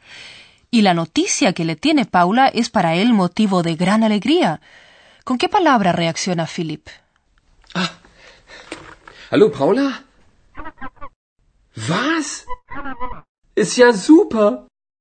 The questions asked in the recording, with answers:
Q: ¿Con qué palabra reacciona Philipp?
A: La noticia le parece super.